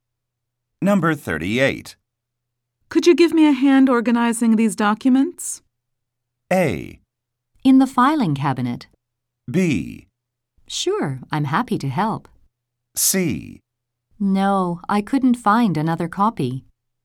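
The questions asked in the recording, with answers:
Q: Could you give me a hand organizing these documents?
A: B: Sure, I'm happy to help.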